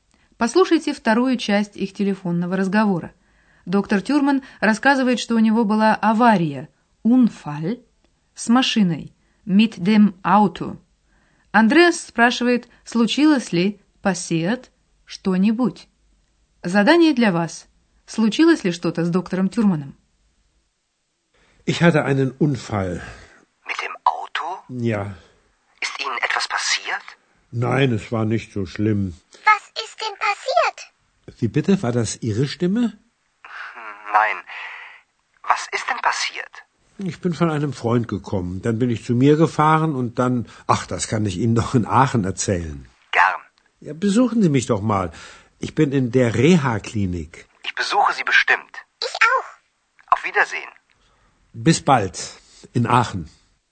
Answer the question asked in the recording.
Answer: С доктором Тюрманом ничего страшного, по его словам, не случилось.